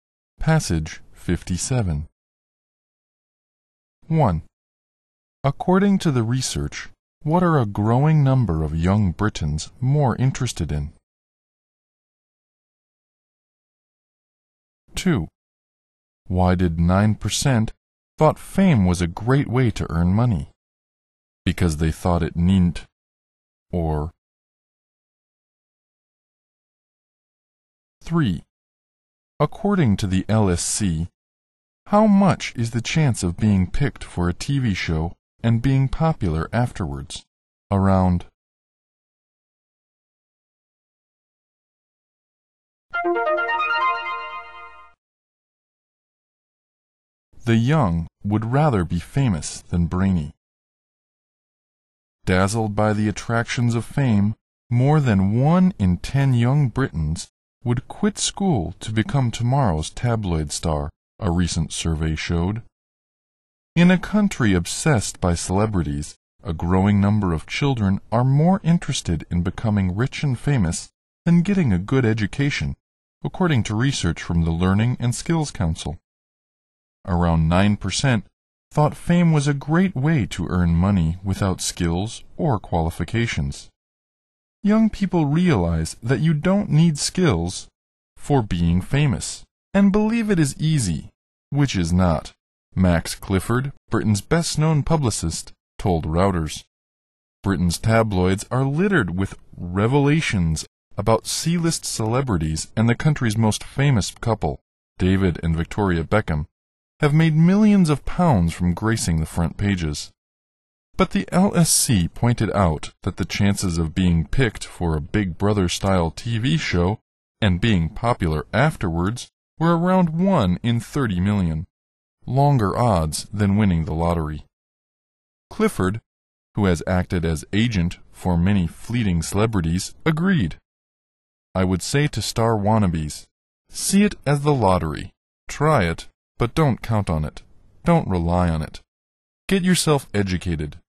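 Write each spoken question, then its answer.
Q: According to the research, what are a growing number of young Britons more interested in?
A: Becoming rich and famous rather than getting a good education

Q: Why did 9% thought fame was a great way to earn money?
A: Because they thought it needn't skills or qualifications

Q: According to the LSC, how much is the chance of being picked for a TV show and being popular afterwards?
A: Around 1 in 30 million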